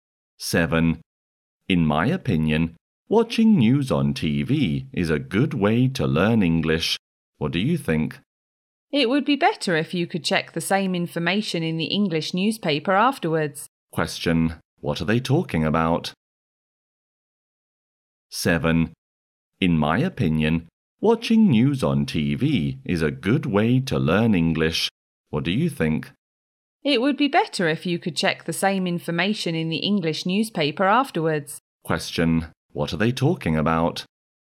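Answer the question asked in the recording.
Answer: A good way to learn English.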